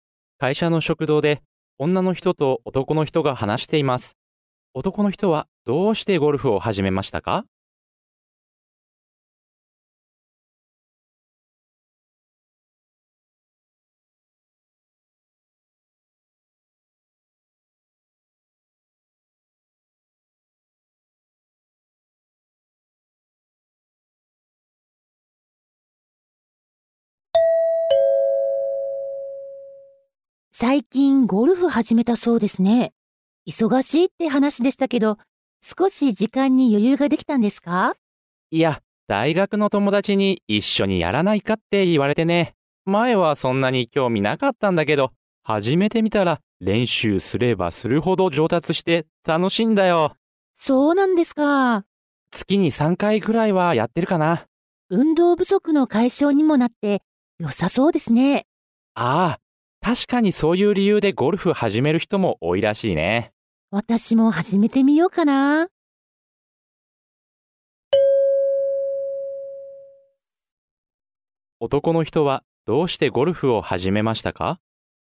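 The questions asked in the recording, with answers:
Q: 男の人はどうしてゴルフを始めましたか?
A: 大学の友達に一緒にやらないかと誘われたから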